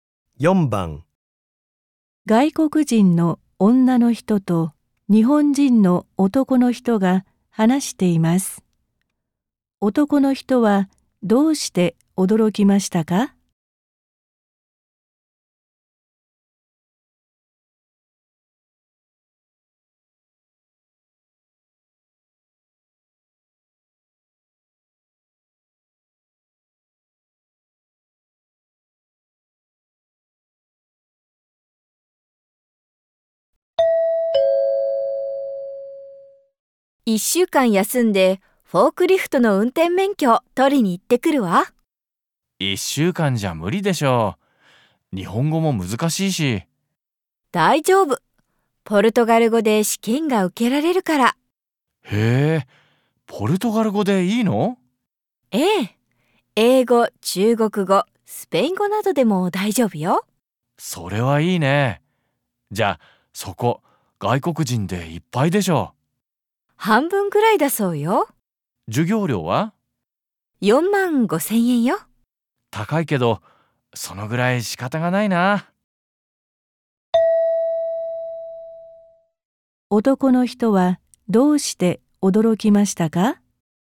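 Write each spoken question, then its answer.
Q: 男の人はどうして驚きましたか?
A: ポルトガル語で試験が受けられるから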